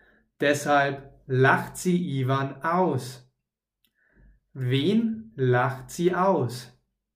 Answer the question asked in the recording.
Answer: Ivan, sie lacht Iwan aus.